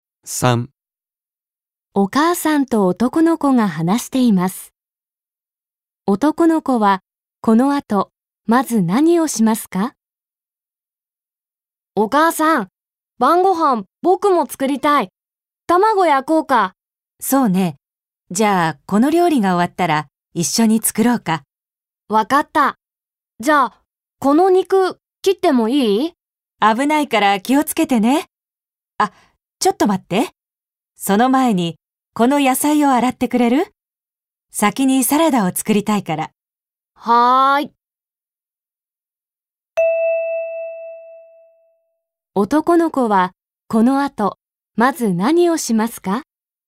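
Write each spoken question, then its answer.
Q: 男の子は、この後、まず何をしますか?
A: 野菜を洗う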